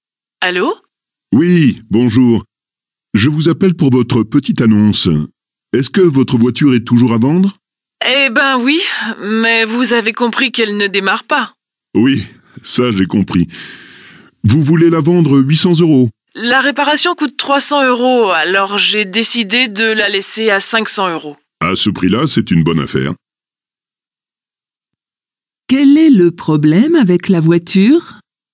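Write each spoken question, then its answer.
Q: Quel est le problème avec la voiture ?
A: Elle ne démarre pas.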